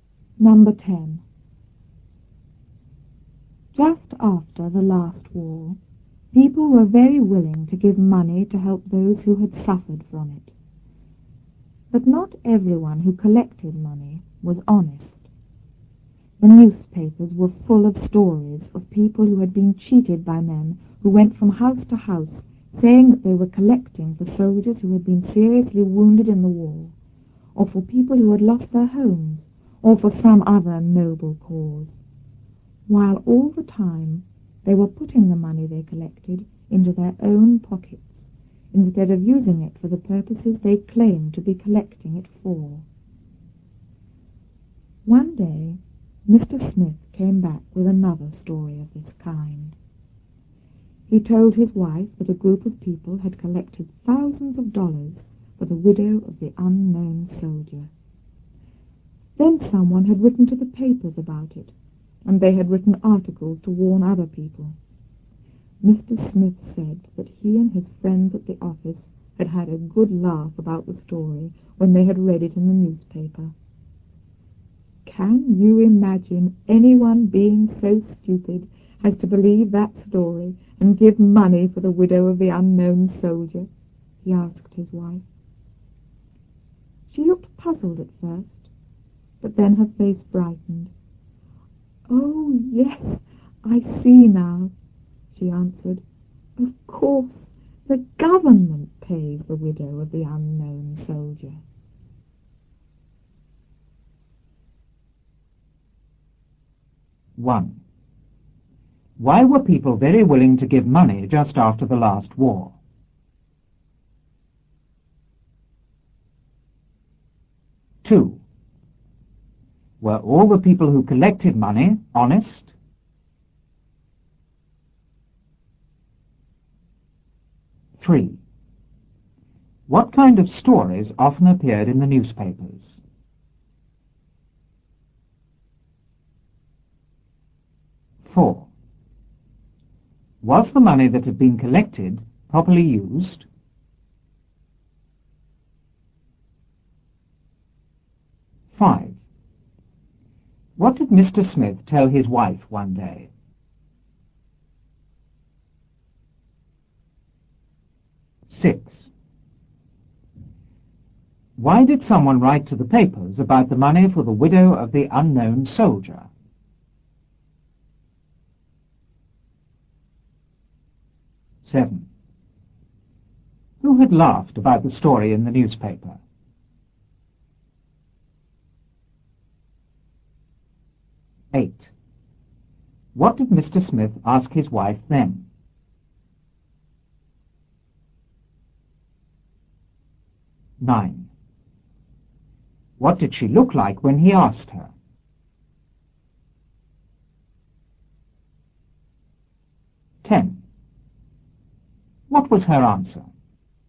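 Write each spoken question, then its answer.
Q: Why were people very willing to give money just after the last war?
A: To help those who had suffered from the war

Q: Were all the people who collected money honest?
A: No, not all of them were honest

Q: What kind of stories often appeared in the newspapers?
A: Stories of people cheated by men collecting money for noble causes who kept it for themselves

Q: Was the money that had been collected properly used?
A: No, the collectors put it into their own pockets

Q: What did Mr. Smith tell his wife one day?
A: That a group had collected thousands of dollars for the widow of the unknown soldier

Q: Why did someone write to the papers about the money for the widow of the unknown soldier?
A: To warn other people

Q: Who had laughed about the story in the newspaper?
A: Mr. Smith and his friends at the office

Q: What did Mr. Smith ask his wife then?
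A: Whether she could imagine anyone so stupid as to give money for the widow of the unknown soldier

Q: What did she look like when he asked her?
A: Puzzled at first, then her face brightened

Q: What was her answer?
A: Of course, the government pays the widow of the unknown soldier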